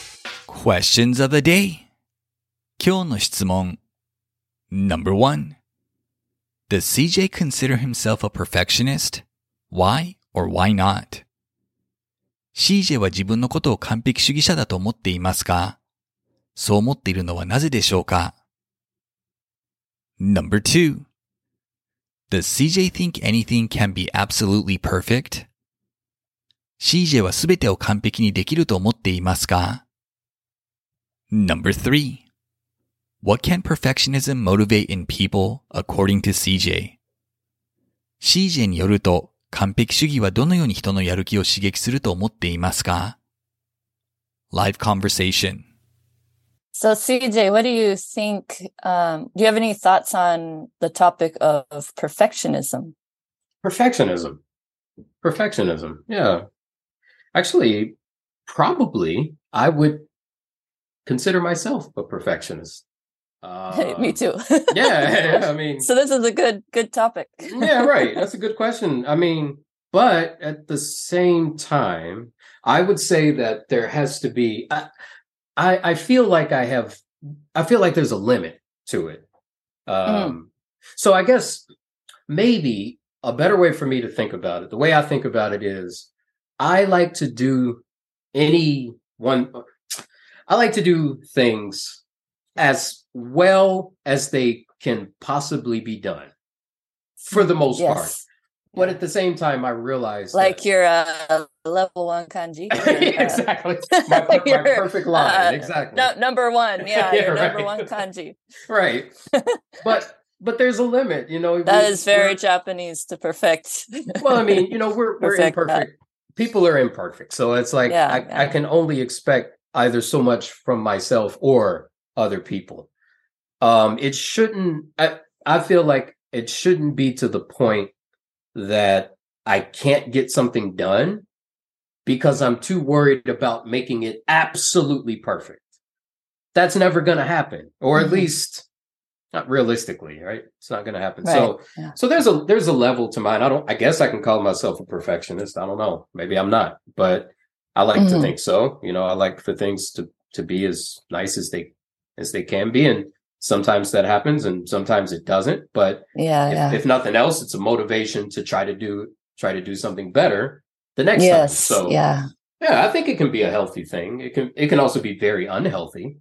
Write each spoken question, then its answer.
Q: Does CJ consider himself a perfectionist? Why or why not?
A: Yes, he considers himself a perfectionist because he likes to do things as well as they can be possibly done.

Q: Does CJ think anything can be absolutely perfect?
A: No, he doesn't think anything can be absolutely perfect.

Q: What can perfectionism motivate in people according to CJ?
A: He believes perfectionism, even if perfection isn't always attainable, can help motivate people to do better the next time they try something.